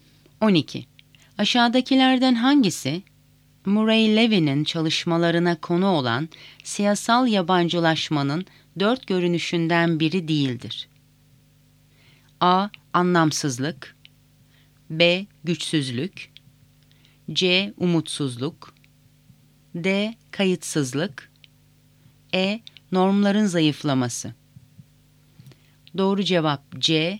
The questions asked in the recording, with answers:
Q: Aşağıdakilerden hangisi Murray Levin'in çalışmalarına konu olan siyasal yabancılaşmanın dört görünüşünden biri değildir?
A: Doğru cevap C. Umutsuzluk.